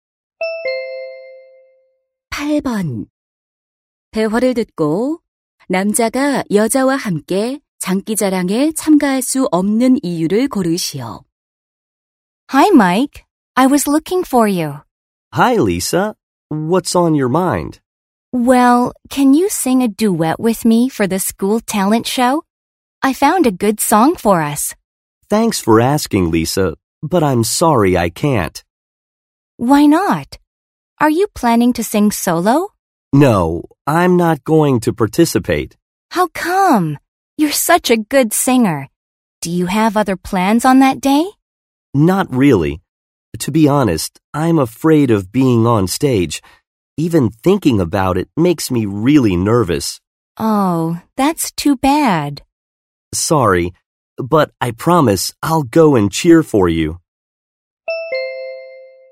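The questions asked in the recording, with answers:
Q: 대화를 듣고 남자가 여자와 함께 장기자랑에 참가할 수 없는 이유를 고르시오.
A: 무대에 서는 것이 두려워서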